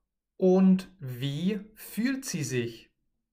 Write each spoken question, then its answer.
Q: Und wie fühlt sie sich?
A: Einsam. Sie fühlt sich einsam.